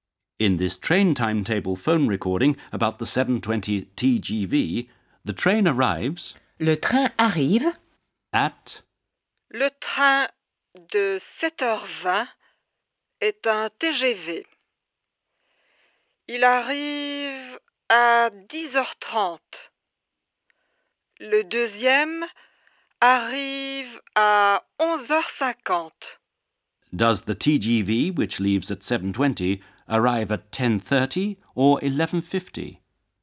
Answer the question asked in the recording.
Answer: The train arrives at 10:30.